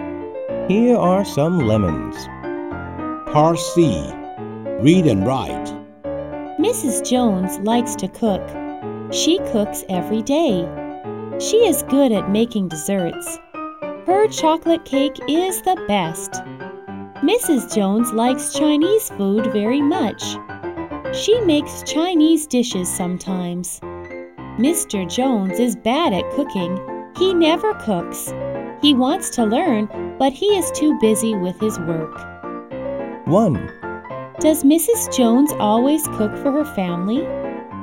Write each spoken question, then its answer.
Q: Does Mrs. Jones always cook for her family?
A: Yes, she does. She cooks every day.